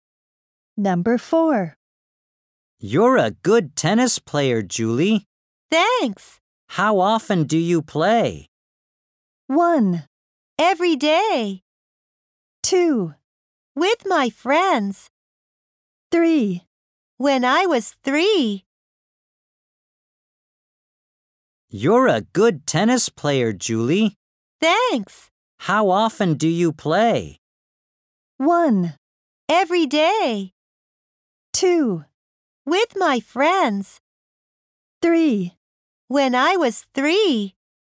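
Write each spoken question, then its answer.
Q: How often do you play?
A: 1: Every day.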